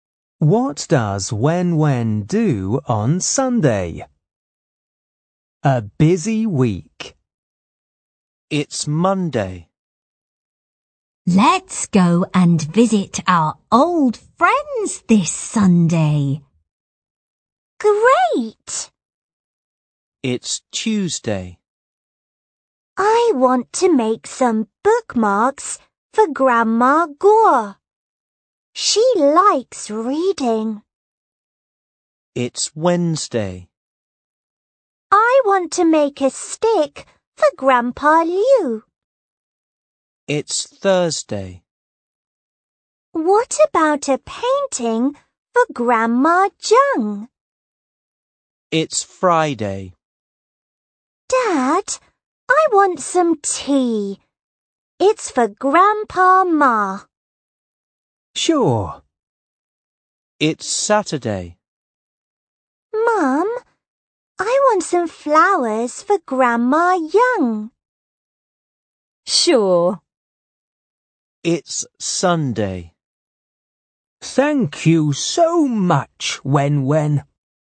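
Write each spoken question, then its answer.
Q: What does Wen do on Sunday?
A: Wen visits old friends (the grandparents) and gives them gifts.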